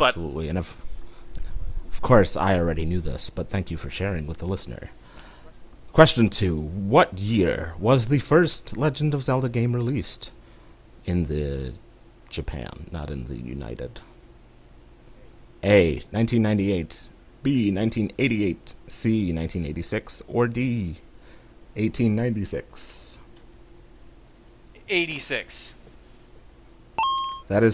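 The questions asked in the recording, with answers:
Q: What year was the first Legend of Zelda game released in the Japan, not in the United?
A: C: 1986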